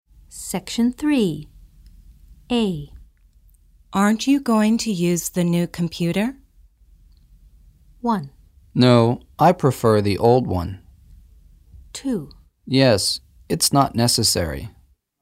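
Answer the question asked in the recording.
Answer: 1: No, I prefer the old one.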